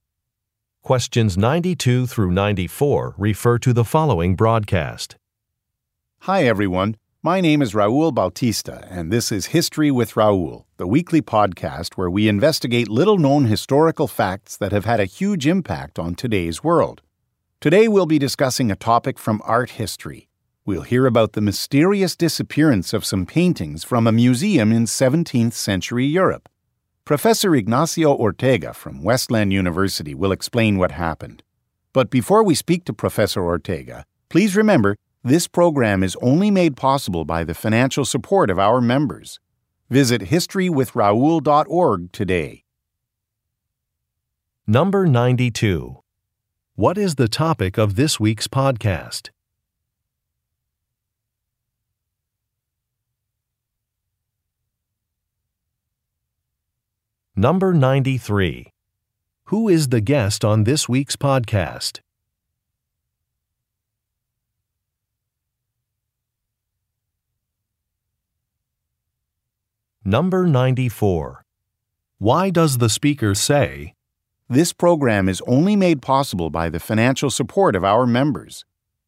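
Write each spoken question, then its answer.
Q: What is the topic of this week's podcast?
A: The mysterious disappearance of paintings from a 17th-century European museum

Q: Who is the guest on this week's podcast?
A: Professor Ignacio Ortega from Westland University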